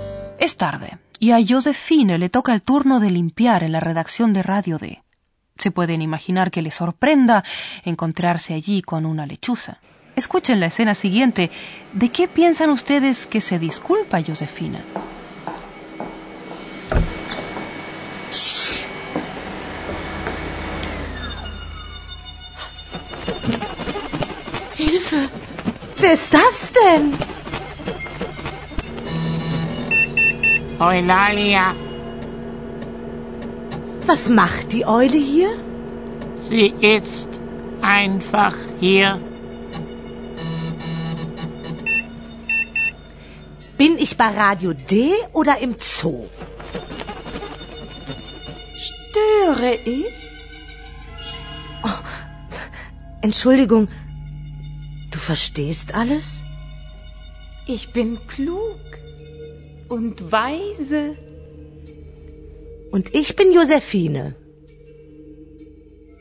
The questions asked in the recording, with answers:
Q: ¿De qué piensan ustedes que se disculpa Josefina?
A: Una vez que Josefine se ha dado cuenta de que Eulalia no solo sabe hablar, sino que evidentemente entiende todo, se disculpa.